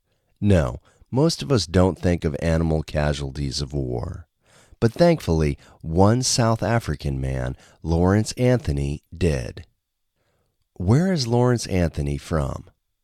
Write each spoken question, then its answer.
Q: Where is Lawrence Anthony from?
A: Lawrence Anthony is from South Africa.